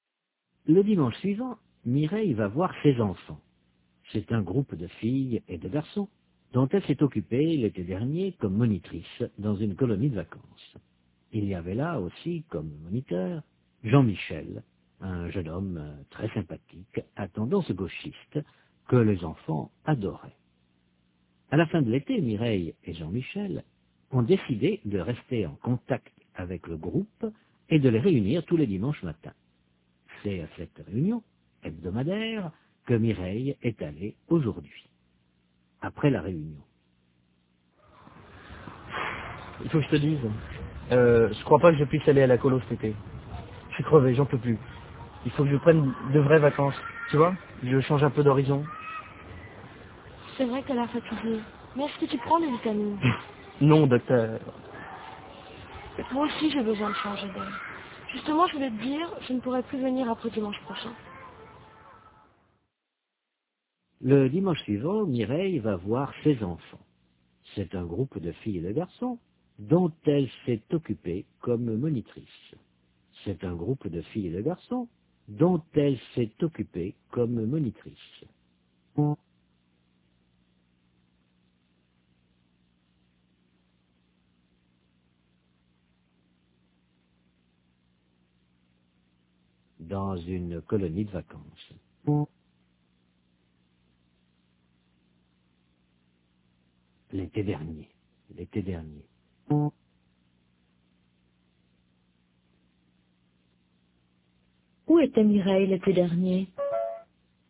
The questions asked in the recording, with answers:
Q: Où était Mireille l'été dernier?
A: Dans une colonie de vacances.